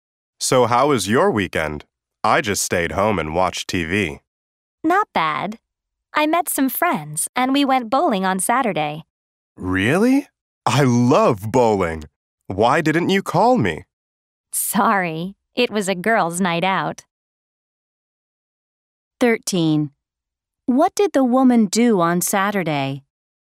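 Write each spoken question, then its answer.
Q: What did the woman do on Saturday?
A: She went bowling with friends.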